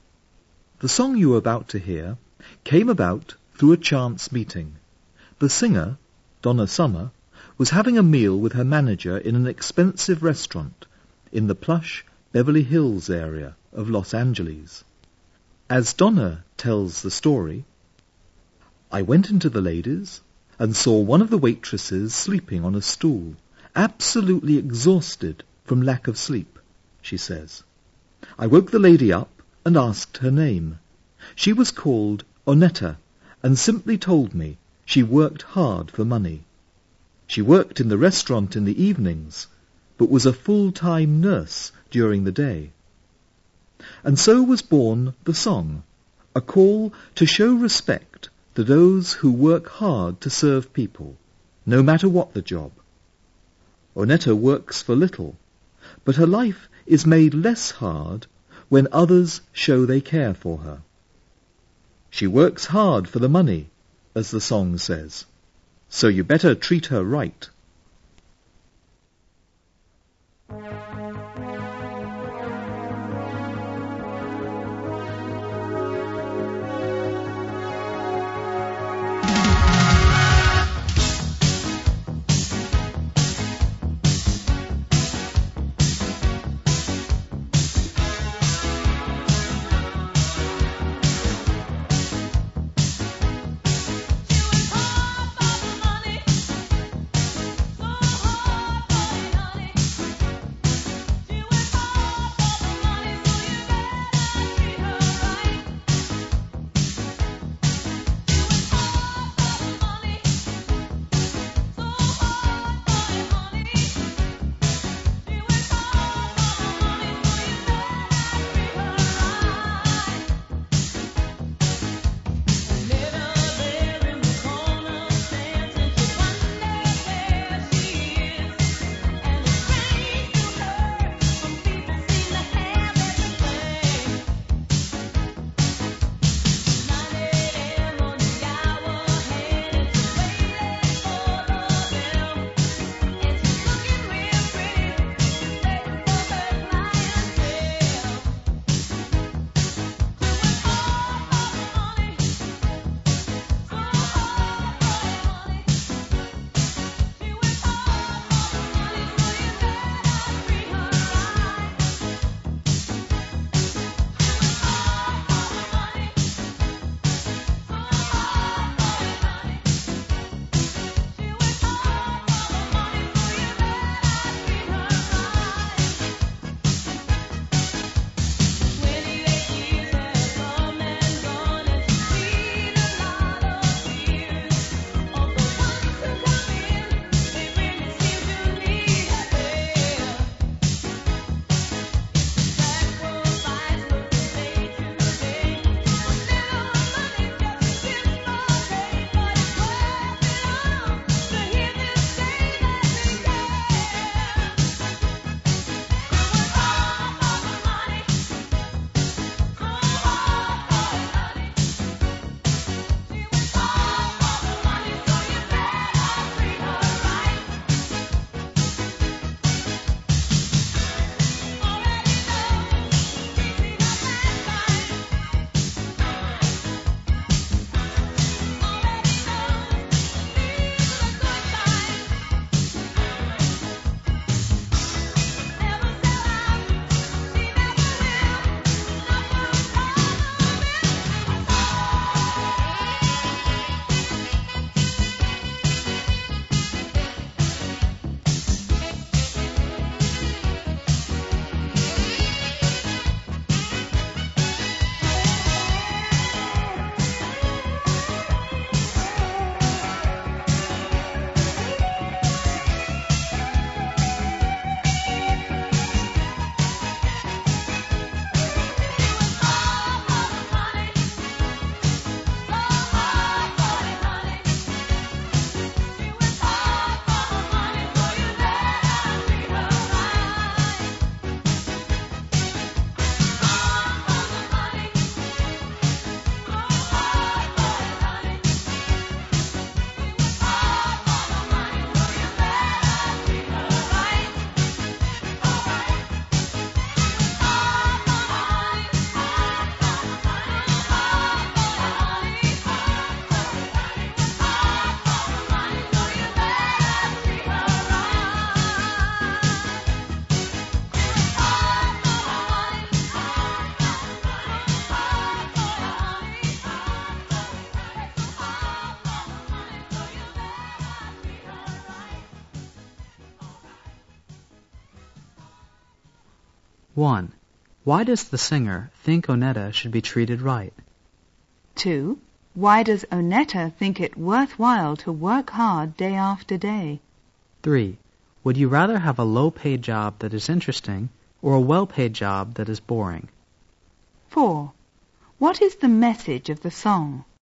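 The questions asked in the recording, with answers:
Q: Why does the singer think Onetta should be treated right?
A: Because she works hard for the money to serve people

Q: What is the message of the song?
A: Respect those who work hard to serve people, no matter what the job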